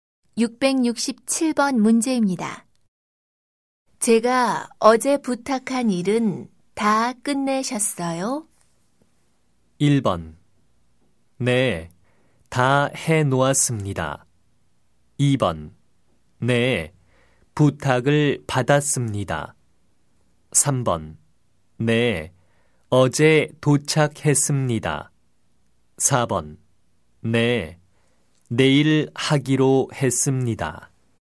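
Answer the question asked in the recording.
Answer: 1: 네, 다 해놓았습니다.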